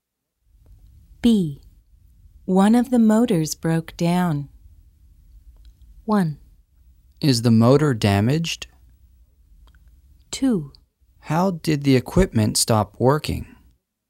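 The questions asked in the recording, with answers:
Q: One of the motors broke down.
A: 2: How did the equipment stop working?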